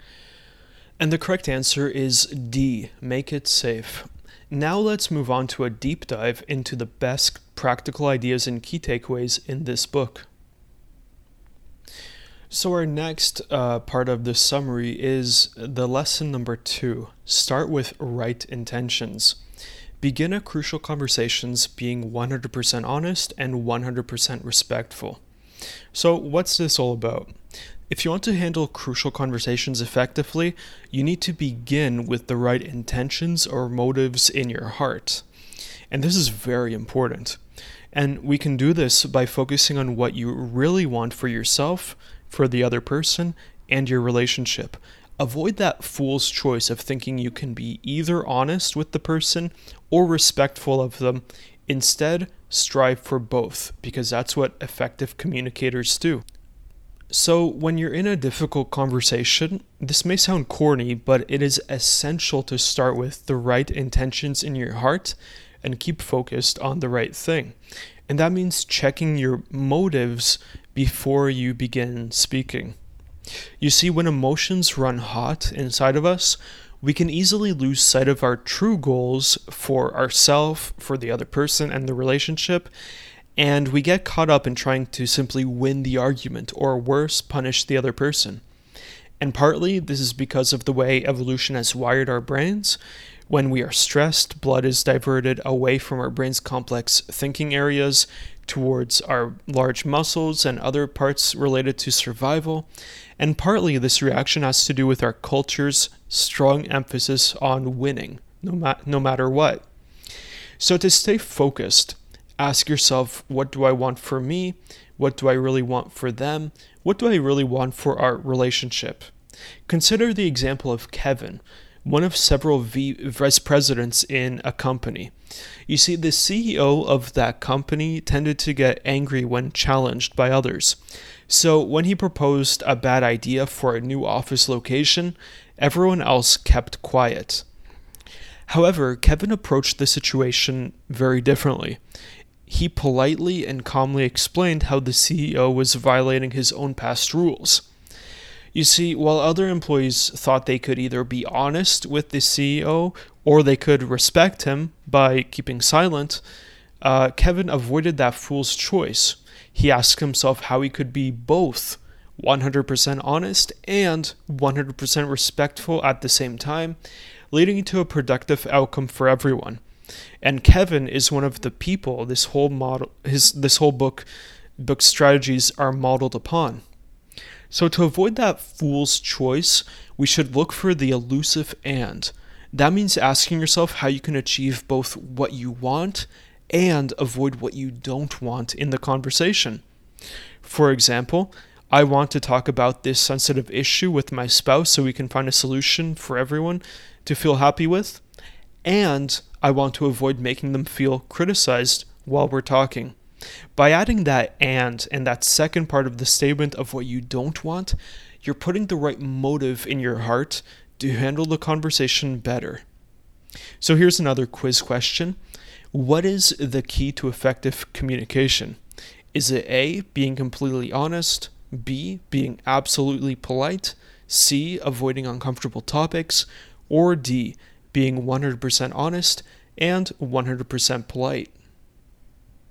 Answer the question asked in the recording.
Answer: Correct answer is D, being both 100% honest and polite.